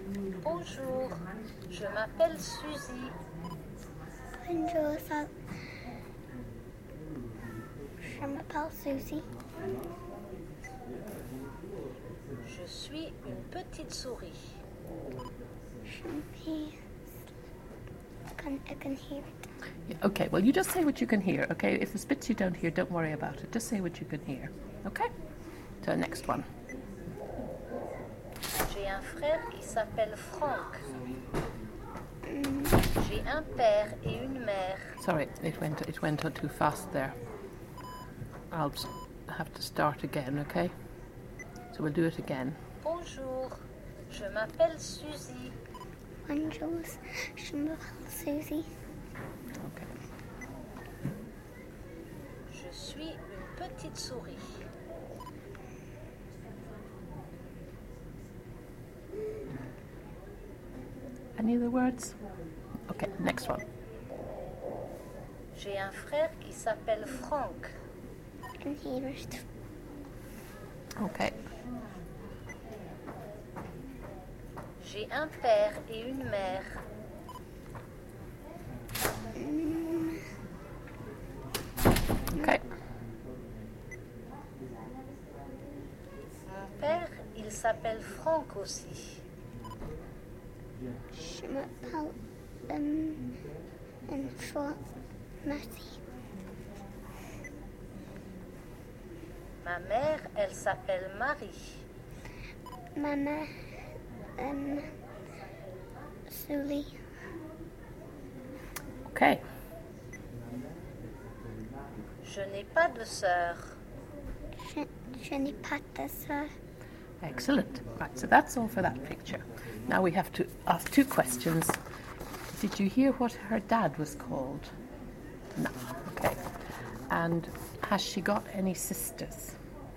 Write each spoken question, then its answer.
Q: And has she got any sisters?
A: No.